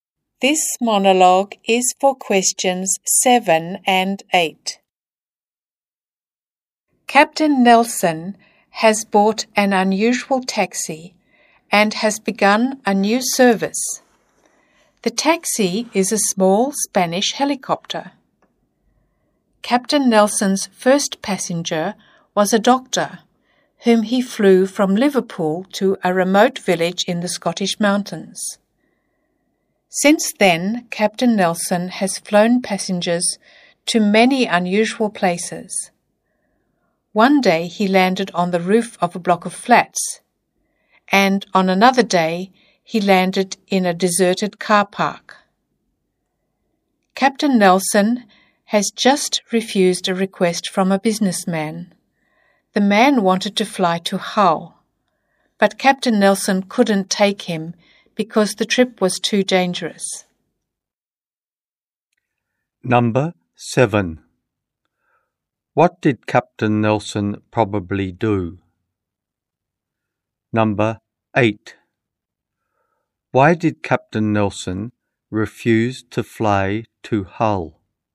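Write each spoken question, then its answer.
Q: Why did Captain Nelson refuse to fly to Hull?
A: The trip was too dangerous.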